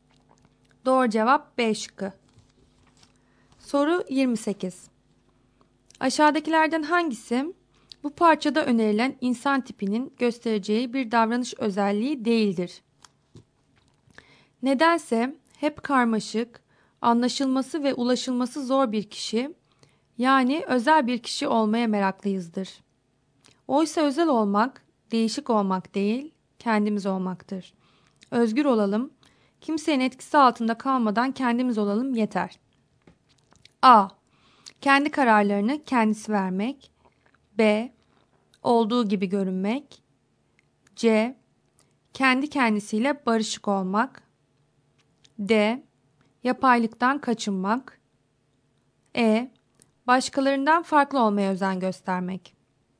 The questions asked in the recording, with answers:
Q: Aşağıdakilerden hangisi bu parçada önerilen insan tipinin göstereceği bir davranış özelliği değildir?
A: Doğru cevap E şıkkı.